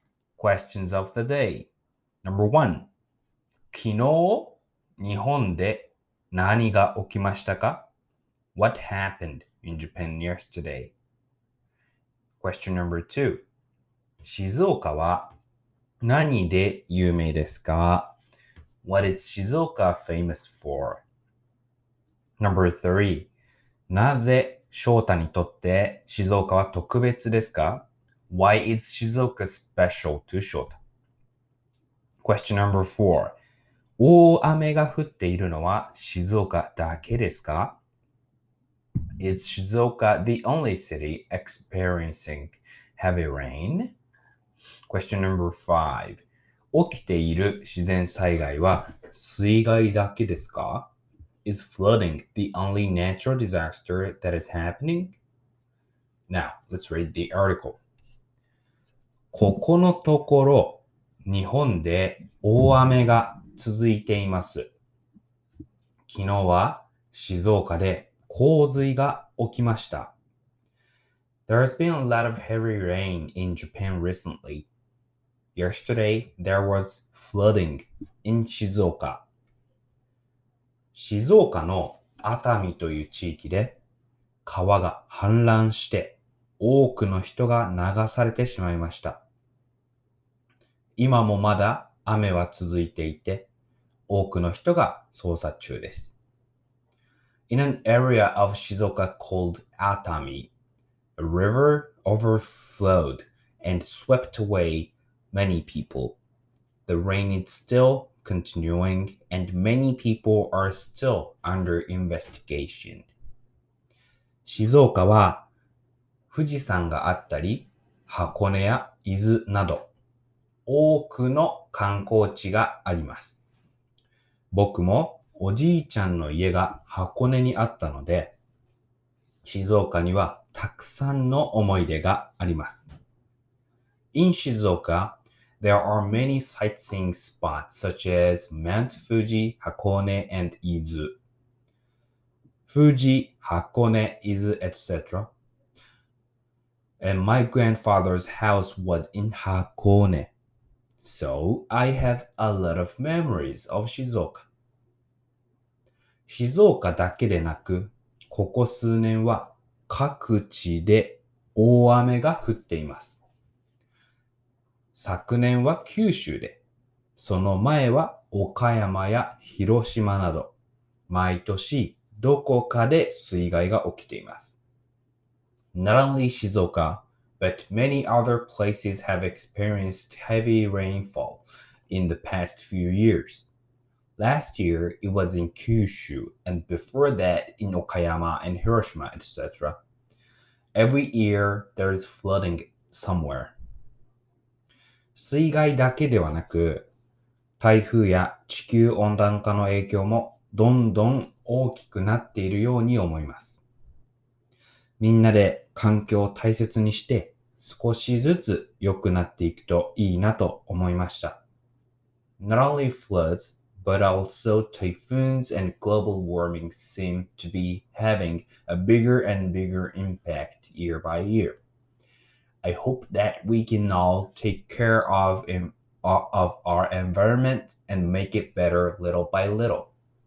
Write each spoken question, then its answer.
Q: 昨日、日本で何が起きましたか ?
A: There was a heavy rain. 大雨が日本でありましたね。

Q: 静岡は何で有名ですか ?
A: 静岡は富士山があったり、箱根や伊豆など多くの観光地があります。

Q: なぜ翔太にとって静岡は特別ですか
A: 僕、えー、おじいちゃんの家が箱根にあったので、静岡にはたくさんの思い出があります。

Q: 大雨が降っているのは静岡だけですか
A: The answer is no, because 静岡だけでなく、ここ数年は各地で大雨が降っています。

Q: 起きている自然災害は水害だけですか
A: The answer is no. 水害だけではなく、台風や地球温暖化の影響もどんどん大きくなっているように思います。